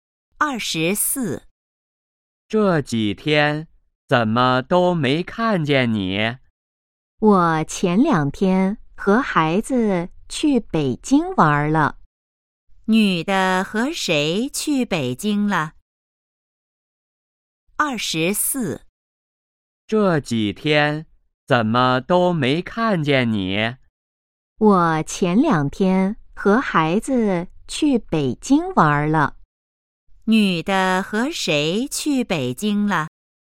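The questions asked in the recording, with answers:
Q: 女的和谁去北京了?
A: 和孩子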